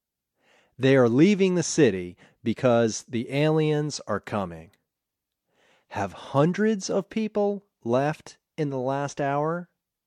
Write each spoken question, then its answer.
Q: Have hundreds of people left in the last hour?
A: No, hundreds haven't left in the last hour.